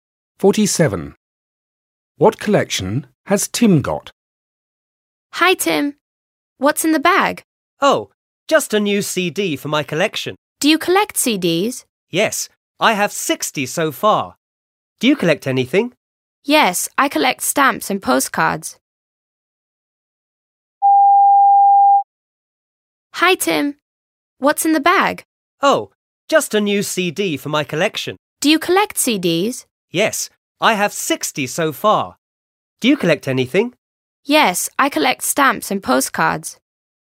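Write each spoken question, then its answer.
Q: What collection has Tim got?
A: CDs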